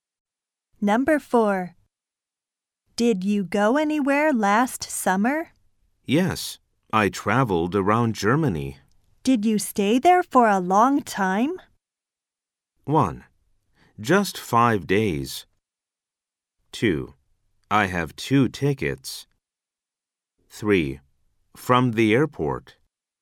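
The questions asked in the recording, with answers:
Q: Did you stay there for a long time?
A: 1: Just 5 days.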